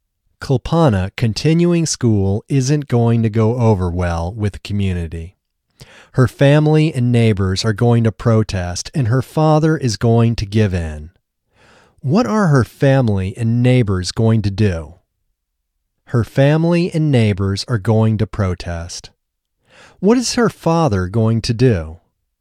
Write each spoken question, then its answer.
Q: What are her family and neighbors going to do?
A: Her family and neighbors are going to protest.

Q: What is her father going to do?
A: Her father is going to give in.